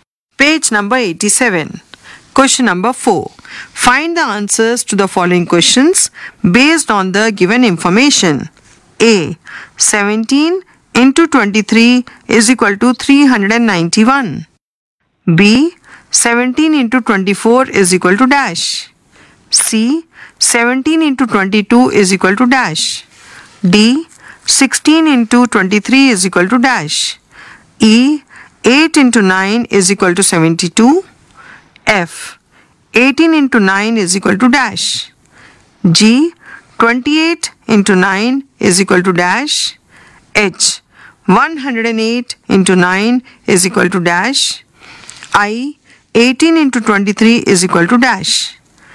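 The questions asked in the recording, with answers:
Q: B. 17 into 24 is equal to dash.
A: 408

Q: C. 17 into 22 is equal to dash.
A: 374

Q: D. 16 into 23 is equal to dash.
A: 368

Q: F. 18 into 9 is equal to dash.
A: 162

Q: G. 28 into 9 is equal to dash.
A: 252

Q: H. 108 into 9 is equal to dash.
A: 972

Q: I. 18 into 23 is equal to dash.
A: 414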